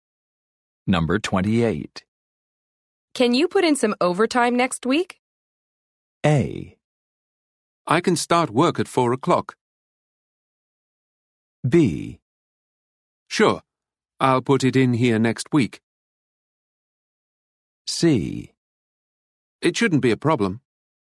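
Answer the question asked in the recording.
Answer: C: It shouldn't be a problem.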